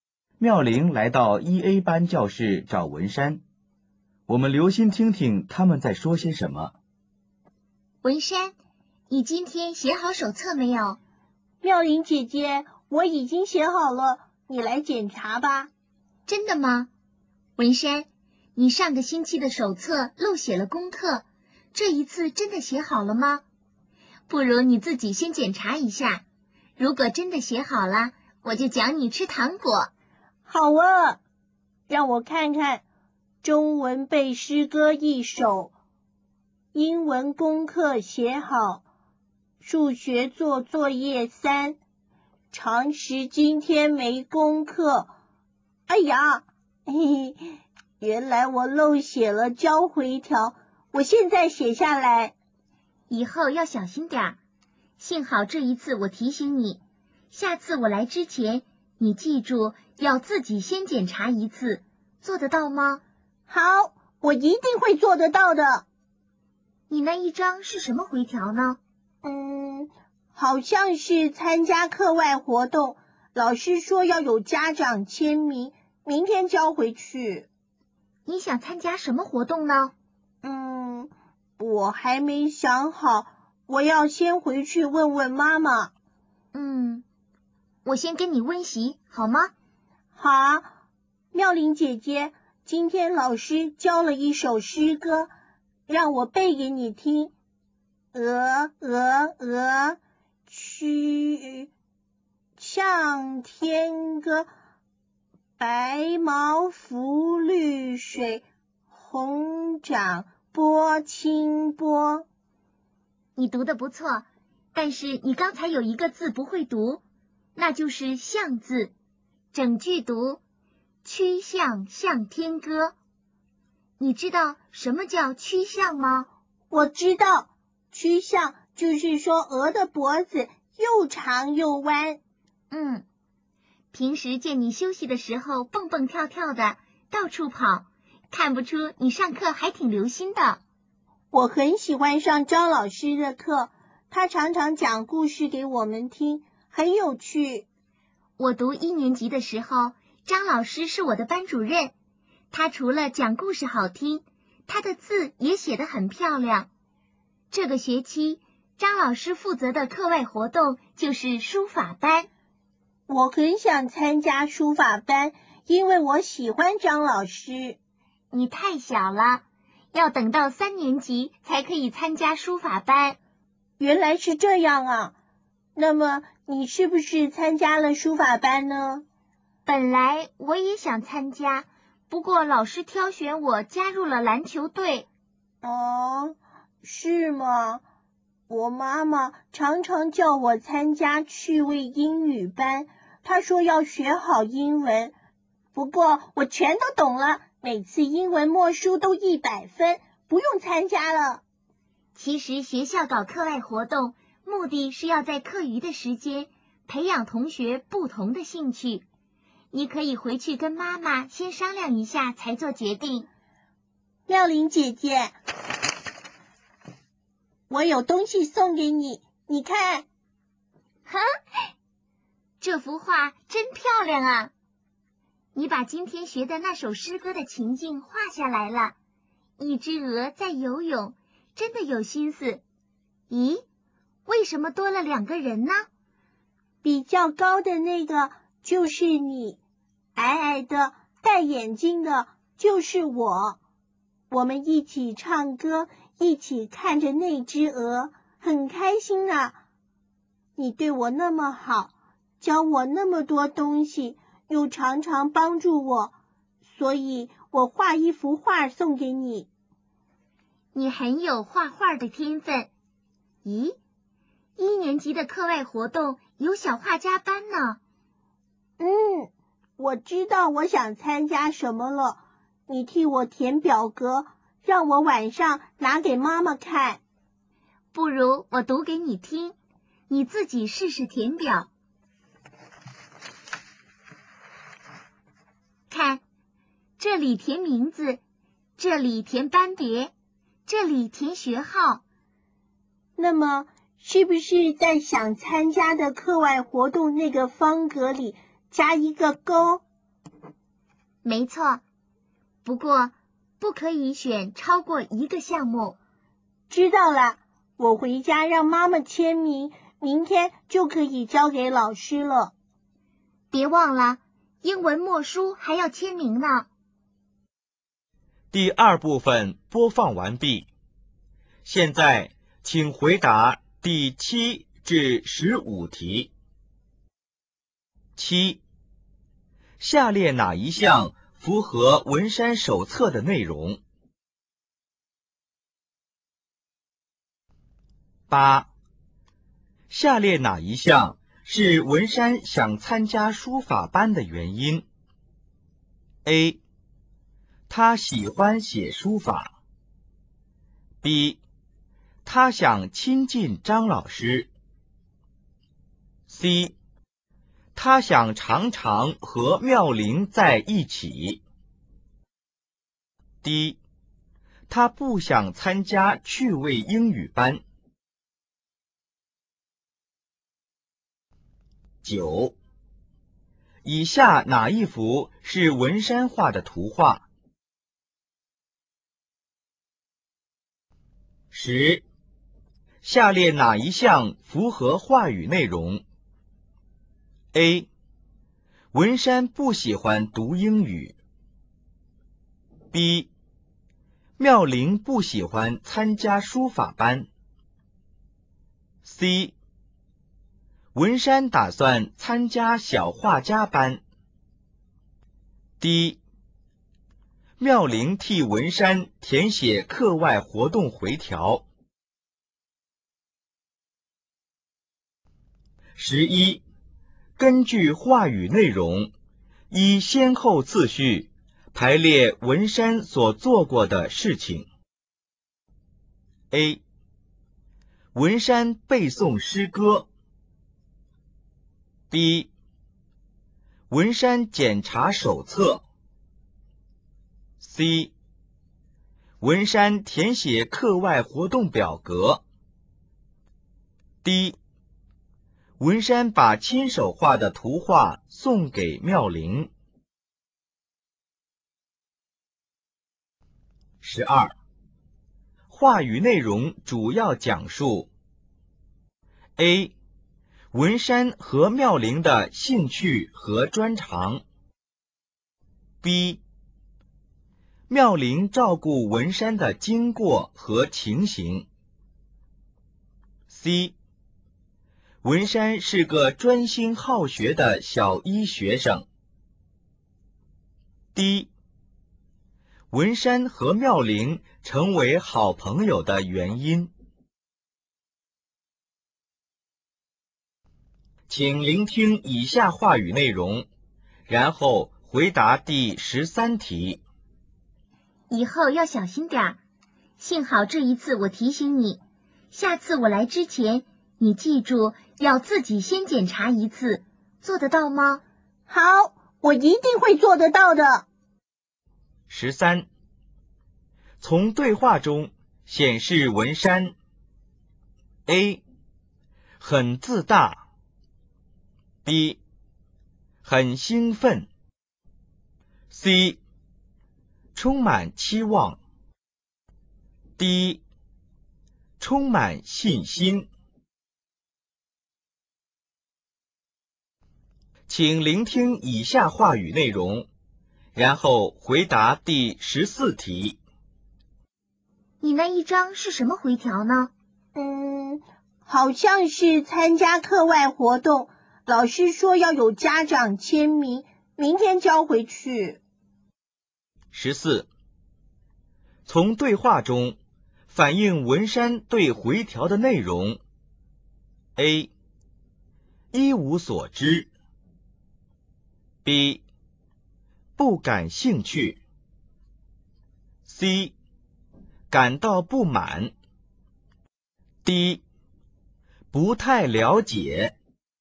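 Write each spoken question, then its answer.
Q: 下列哪一项是文山想参加书法班的原因? A. 他喜欢写书法。B. 他想亲近张老师。 C. 他想常常和妙玲在一起。D. 他不想参加趣味英语班。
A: B: 他想亲近张老师

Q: 下列哪一项符合话语内容? A. 文山不喜欢读英语。B. 妙玲不喜欢参加书法班。 C. 文山打算参加小画家班。 D.妙龄替文山填写课外活动回条。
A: C: 文山打算参加小画家班

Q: 根据话语内容,依先后次序排列文山所做过的事情。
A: B、A、D、C

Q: 话语内容主要讲述 A, 文山和妙龄的兴趣和专长。B,妙龄照顾文山的经过和情形。 C, 文山是个专心好学的小一学生。D, 文山和妙龄成为好朋友的原因。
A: B: 妙龄照顾文山的经过和情形

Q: 从对话中显示文山 A 很自大, B 很兴奋, C充满期望, D 充满信心。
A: D: 充满信心

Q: 从对话中反映文山对回条的内容。 A 一无所知。B 不感兴趣。 C 感到不满。 D 不太了解。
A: D: 不太了解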